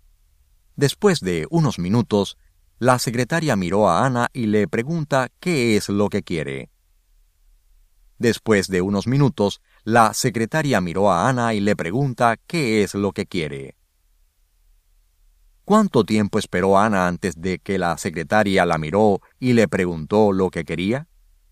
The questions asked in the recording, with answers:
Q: ¿Cuánto tiempo esperó Ana antes de que la secretaria la miró y le preguntó lo que quería?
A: Ana estaba esperando unos minutos.